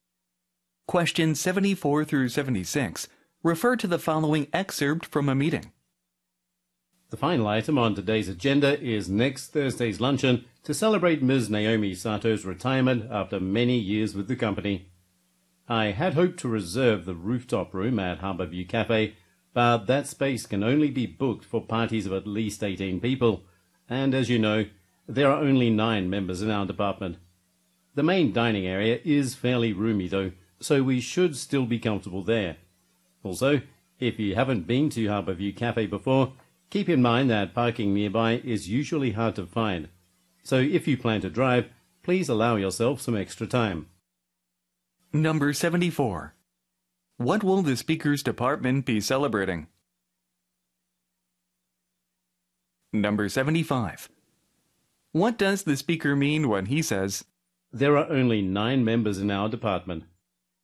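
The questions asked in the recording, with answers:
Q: What will the speaker's department be celebrating?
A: Naomi Sato's retirement

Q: What does the speaker mean when he says, There are only 9 members in our department?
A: The group is too small to book the rooftop room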